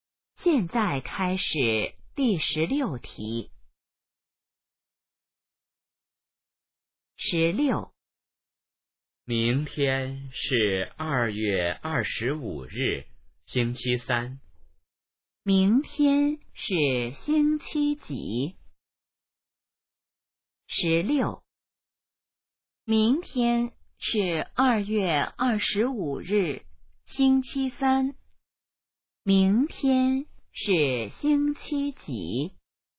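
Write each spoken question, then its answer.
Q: 明天是星期几?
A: 星期三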